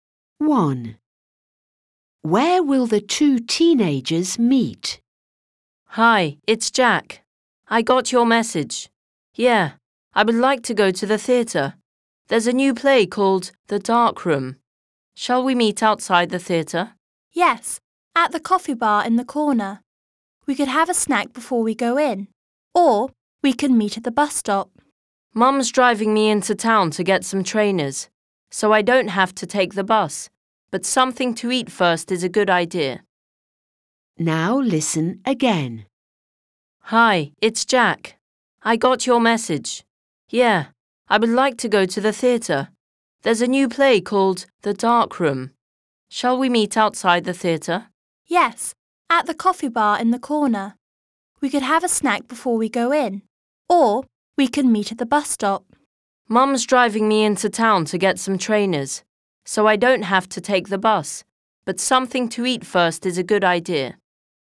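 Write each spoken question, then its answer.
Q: Where will the two teenagers meet?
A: At the coffee bar on the corner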